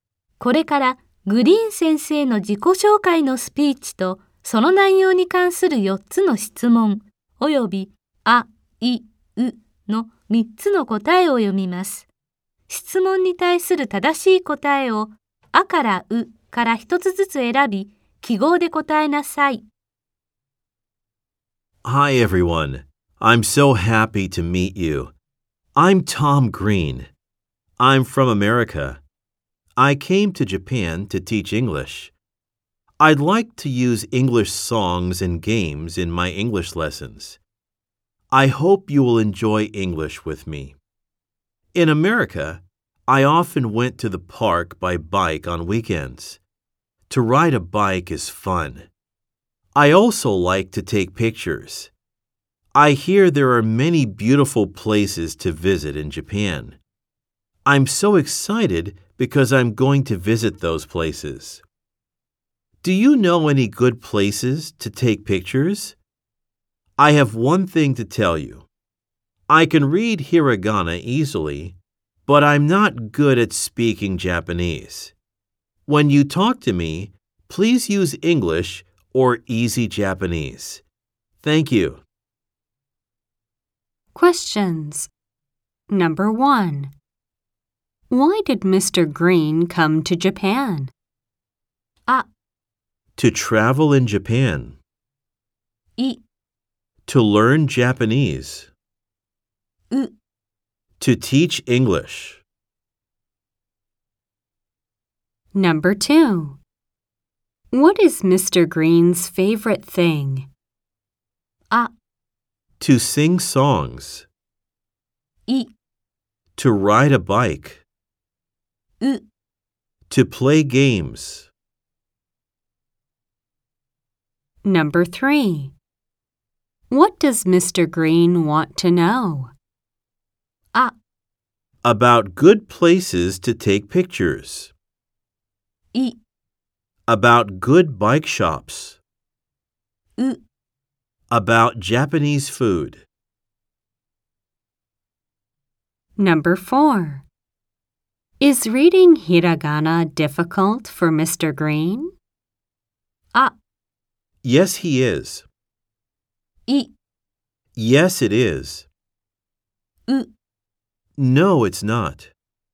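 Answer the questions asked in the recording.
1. う: To teach English.
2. い: To ride a bike.
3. あ: About good places to take pictures.
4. う: No, it's not.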